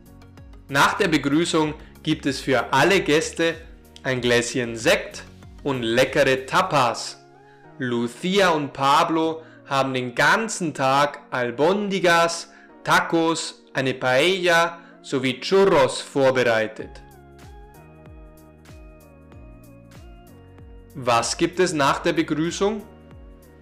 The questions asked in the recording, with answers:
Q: Was gibt es nach der Begrüßung?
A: Ein Gläschen Sekt und leckere Tapas.